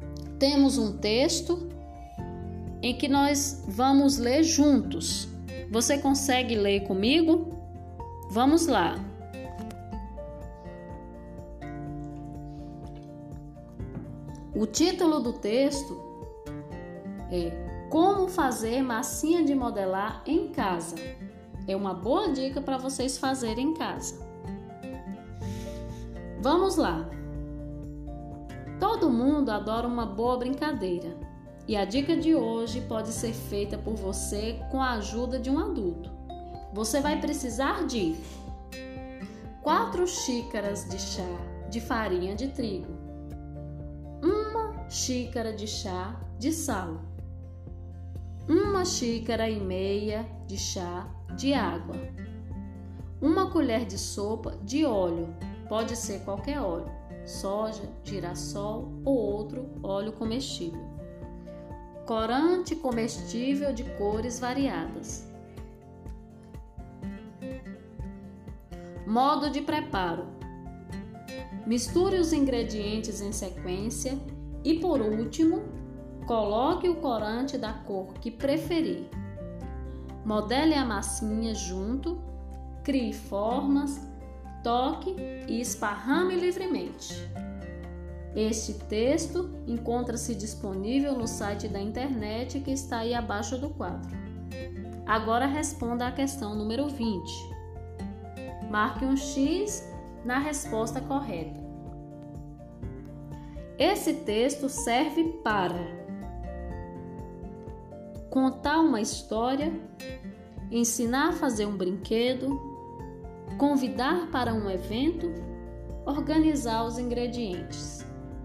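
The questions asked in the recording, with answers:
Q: Esse texto serve para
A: B: ensinar a fazer um brinquedo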